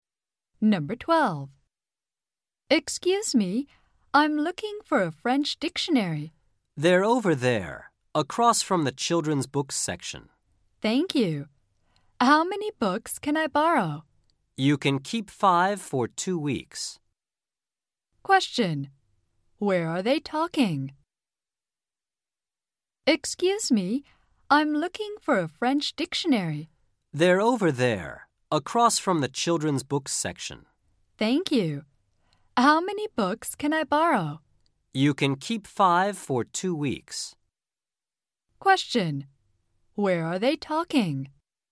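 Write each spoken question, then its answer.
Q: Where are they talking?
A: In a library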